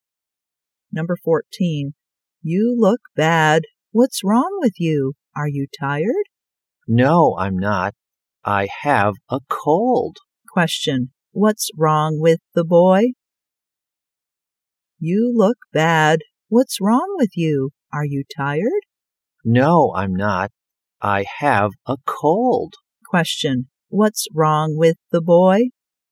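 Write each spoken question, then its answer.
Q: What's wrong with the boy?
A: He has a cold.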